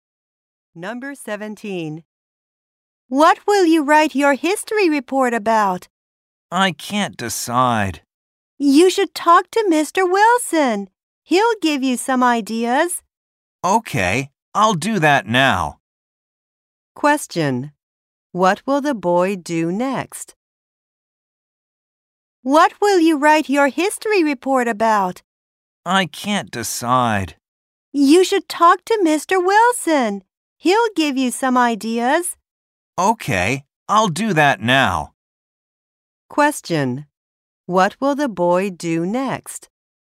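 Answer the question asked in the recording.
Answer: Talk to Mr. Wilson.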